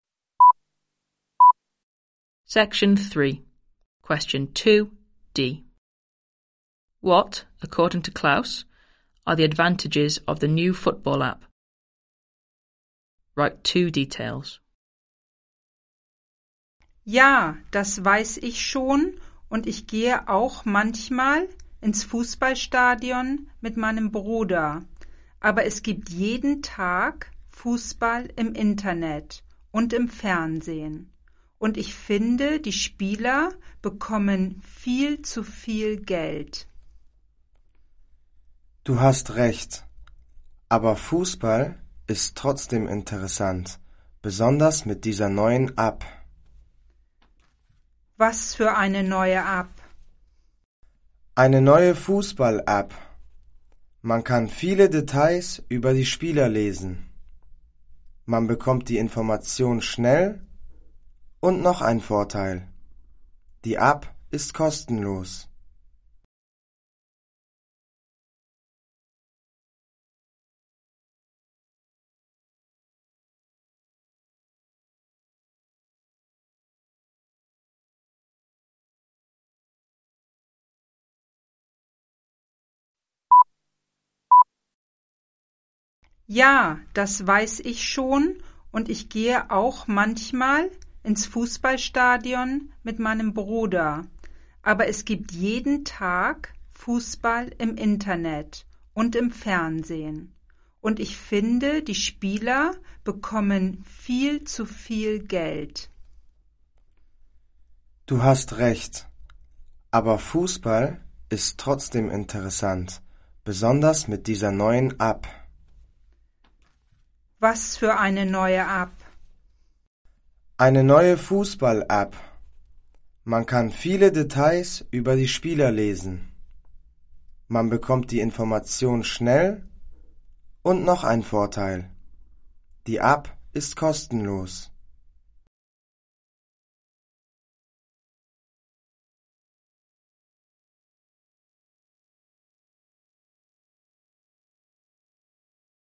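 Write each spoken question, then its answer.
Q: What, according to Klaus, are the advantages of the new football app?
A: You can read lots of details about players; you get information quickly; it is free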